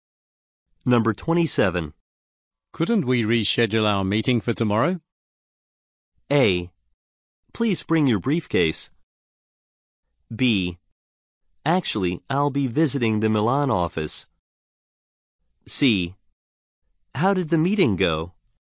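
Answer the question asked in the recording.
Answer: B: Actually, I'll be visiting the Milan office.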